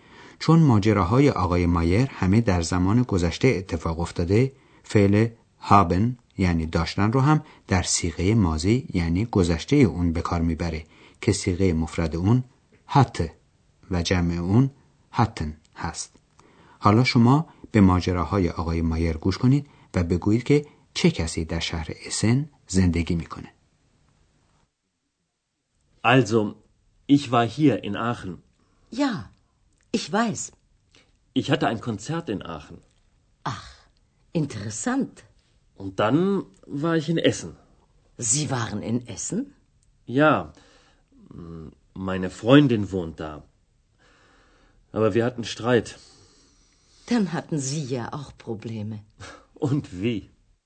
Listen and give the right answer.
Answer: Pas dar shahr Essen dost dokhtar aghay Mayer zendegi mikone.